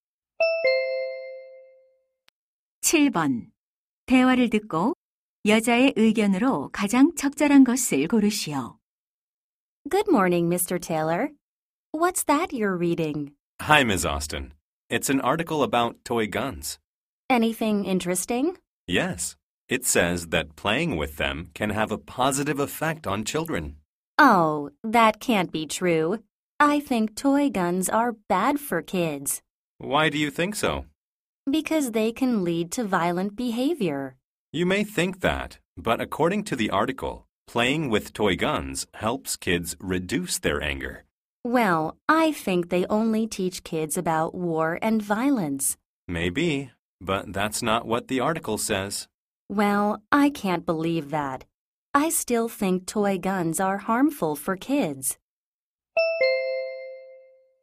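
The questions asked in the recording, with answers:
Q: 대화를 듣고 여자의 의견으로 가장 적절한 것을 고르시오.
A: 장난감 총은 아이들에게 해롭다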